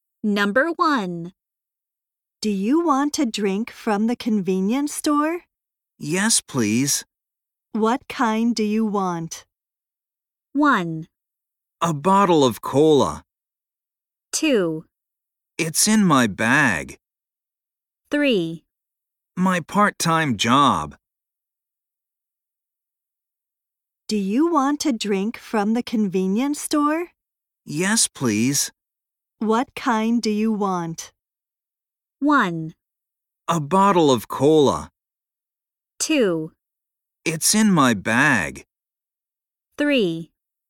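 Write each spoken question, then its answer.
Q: What kind do you want?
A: 1: A bottle of cola.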